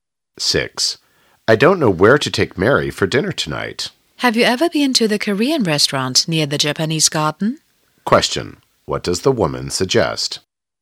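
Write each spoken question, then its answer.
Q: What does the woman suggest?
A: Taking Mary to the Korean restaurant near the Japanese Garden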